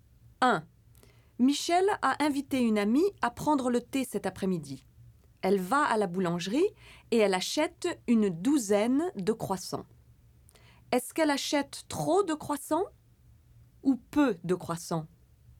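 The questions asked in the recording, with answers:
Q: Est-ce qu'elle achète trop de croissants ou peu de croissants?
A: trop de croissants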